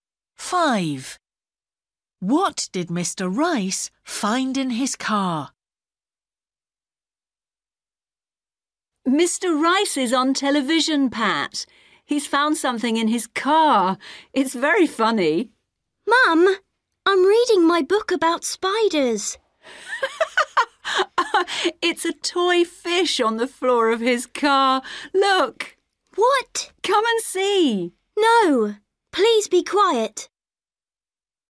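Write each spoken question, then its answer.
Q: What did Mr. Rice find in his car?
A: a toy fish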